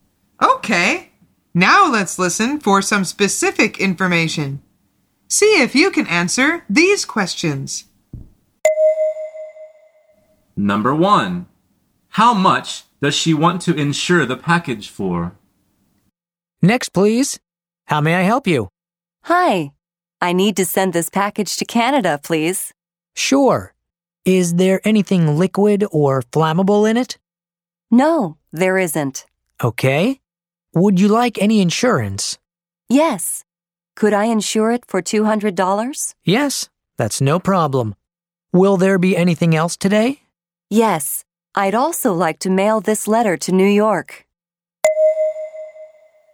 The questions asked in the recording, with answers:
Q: How much does she want to insure the package for?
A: The answer is $200.